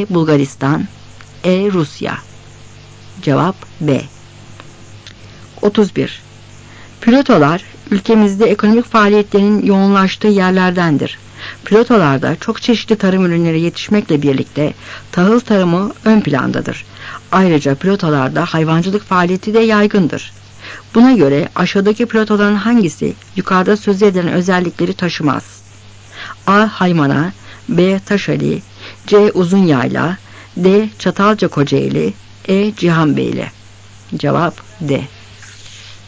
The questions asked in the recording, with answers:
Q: Buna göre aşağıdaki platoların hangisi yukarıda söz edilen özellikleri taşımaz?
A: Cevap D.